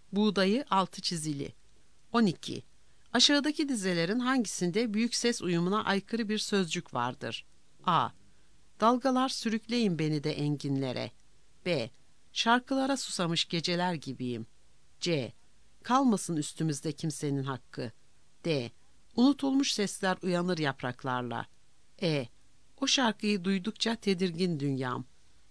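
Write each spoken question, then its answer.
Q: Aşağıdaki dizelerin hangisinde büyük ses uyumuna aykırı bir sözcük vardır?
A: E: O şarkıyı duydukça tedirgin dünyam.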